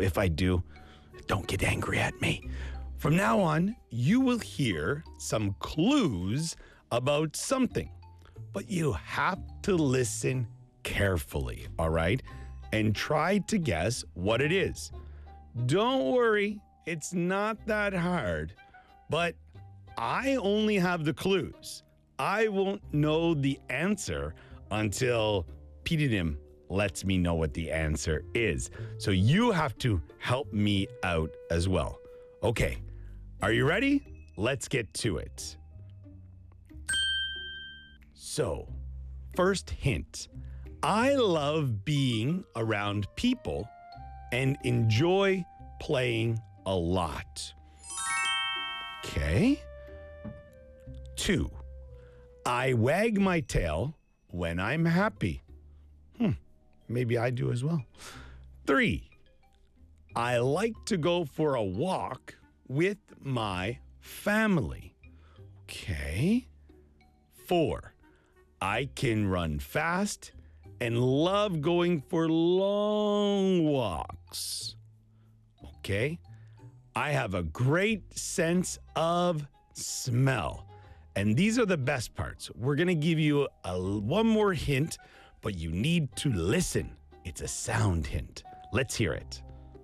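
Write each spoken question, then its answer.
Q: And try to guess what it is.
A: a dog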